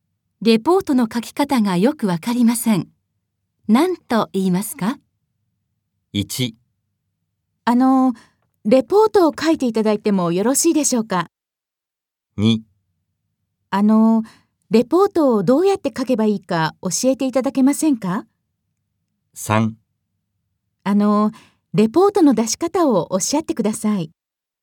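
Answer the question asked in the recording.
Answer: 2: レポートをどうやって書けばいいか教えていただけませんか?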